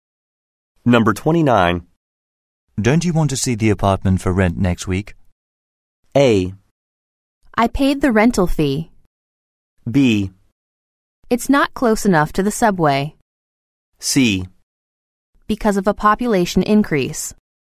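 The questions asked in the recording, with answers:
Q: Don't you want to see the apartment for rent next week?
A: B: It's not close enough to the subway.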